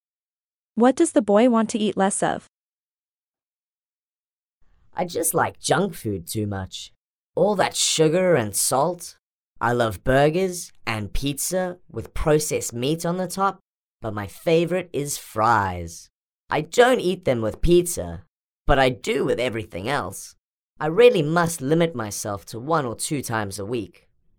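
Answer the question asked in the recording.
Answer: fries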